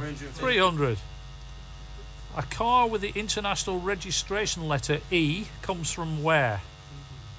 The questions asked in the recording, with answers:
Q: A car with the international registration letter E comes from where?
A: Comes from Spain, España.